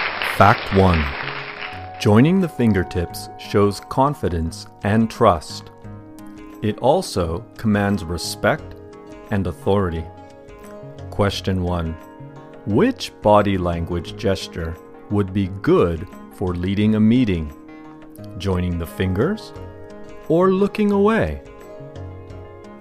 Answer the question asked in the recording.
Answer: Joining the fingertips shows confidence and trust.